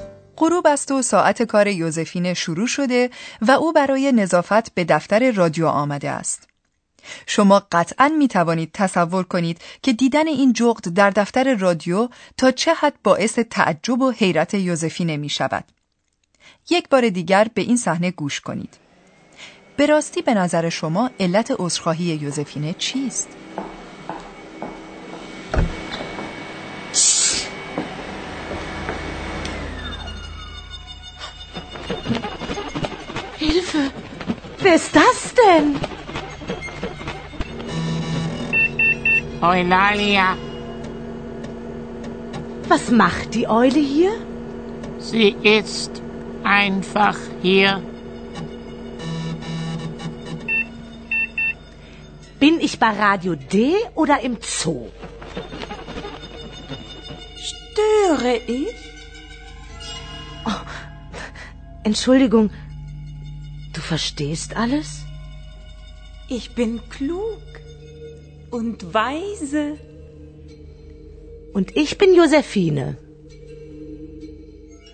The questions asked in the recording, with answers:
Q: به راستی به نظر شما علت عذرخواهی یوزفینه چیست؟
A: پس از آن که یوزفینه متوجه می شود که اولالیا نه تنها جغدی سخنگوست بلکه حتی آشکارا قادر به فهم همه چیز است، عذرخواهی می کند.